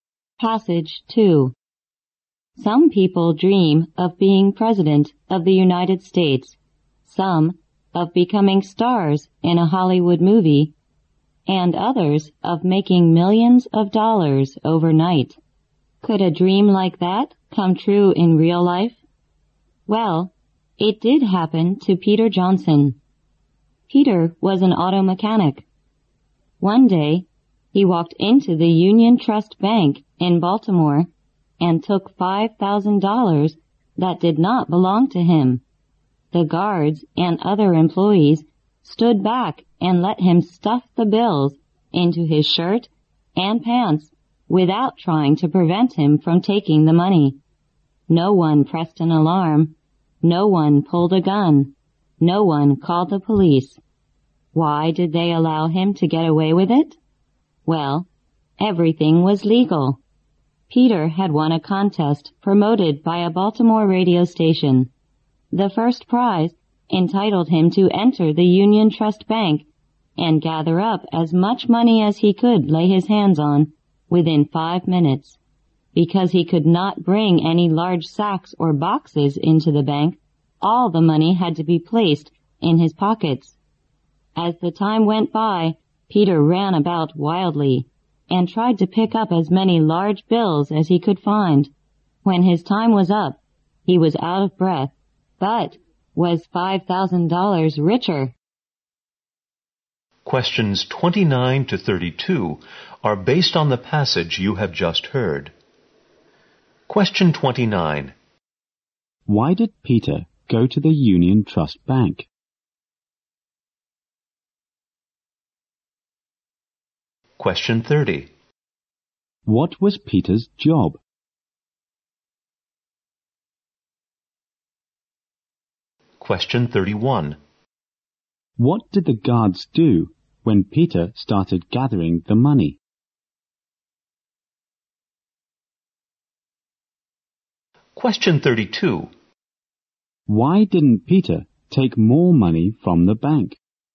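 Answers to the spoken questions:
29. He had won a radio contest prize
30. Auto mechanic
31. They stood back and let him
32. He had only 5 minutes and could only use his pockets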